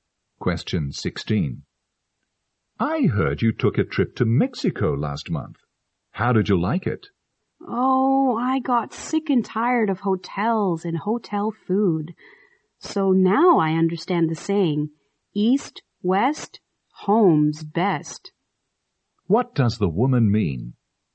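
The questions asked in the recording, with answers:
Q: What does the woman mean?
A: She prefers being at home to traveling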